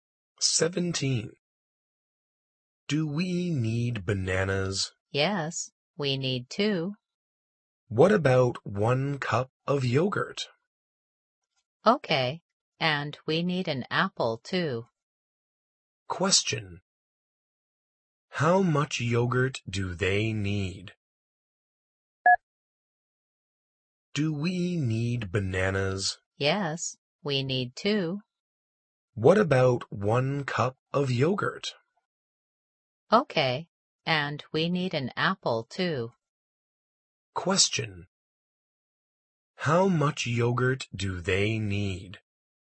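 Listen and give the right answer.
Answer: One cup.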